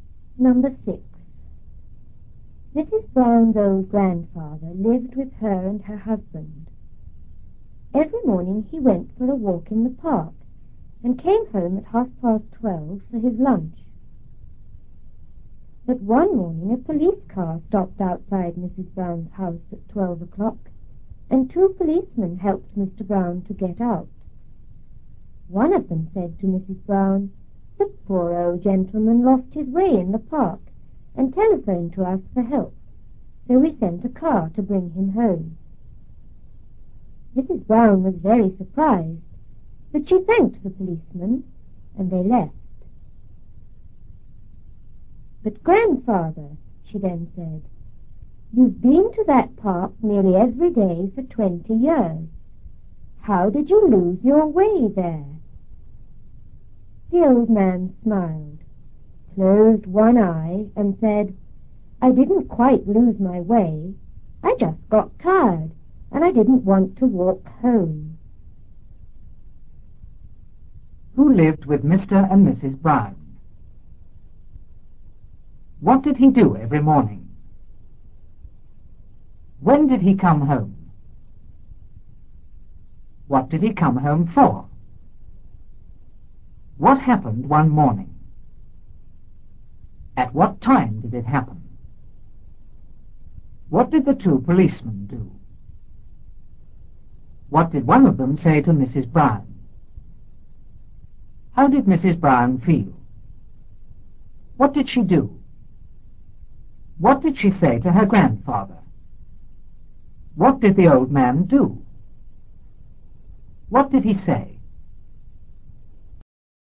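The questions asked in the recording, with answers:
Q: Who lived with Mr. and Mrs. Brown?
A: Mrs. Brown's old grandfather

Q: What did he do every morning?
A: He went for a walk in the park

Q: When did he come home?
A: At 12:30

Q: What did he come home for?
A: For his lunch

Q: What happened one morning?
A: A police car stopped outside the house and two policemen helped him get out

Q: At what time did it happen?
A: At 12:00

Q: What did the two policemen do?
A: They helped him get out of the car

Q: What did one of them say to Mrs. Brown?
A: The old gentleman lost his way in the park and phoned for help, so they brought him home

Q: How did Mrs. Brown feel?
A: Very surprised

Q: What did she do?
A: She thanked the policeman

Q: What did she say to her grandfather?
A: He had been to that park nearly every day for 20 years, so how did he lose his way?

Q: What did the old man do?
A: He smiled and closed one eye

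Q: What did he say?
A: He didn't quite lose his way; he just got tired and didn't want to walk home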